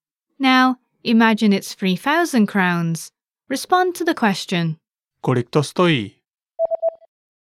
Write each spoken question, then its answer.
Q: Kolik to stojí?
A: Stojí to 3,000 korun.